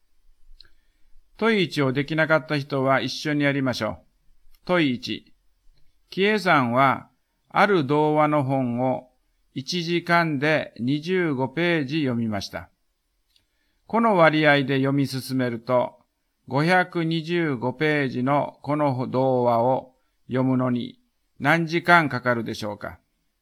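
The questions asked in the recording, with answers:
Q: この割合で読み進めると、525ページのこの童話を読むのに何時間かかるでしょうか。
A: 21時間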